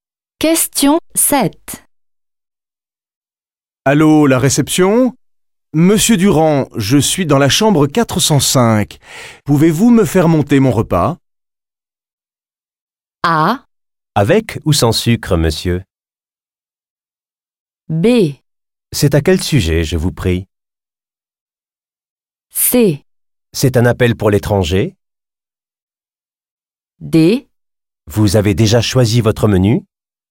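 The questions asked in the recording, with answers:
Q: Allô, la réception ? Monsieur Durand, je suis dans la chambre 405. Pouvez-vous me faire monter mon repas ?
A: D: Vous avez déjà choisi votre menu ?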